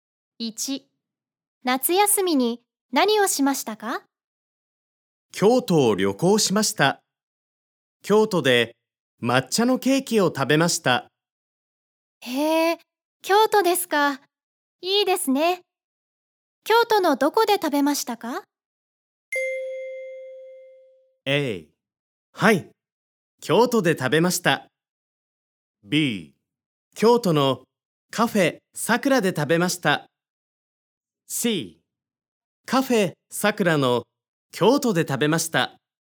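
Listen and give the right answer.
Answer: B: 京都のカフェさくらで食べました。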